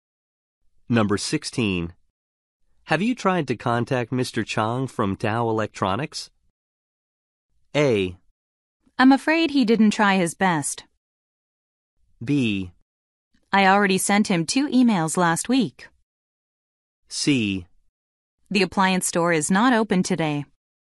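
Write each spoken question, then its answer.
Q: Have you tried to contact Mr. Chang from Dow Electronics?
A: B: I already sent him 2 emails last week.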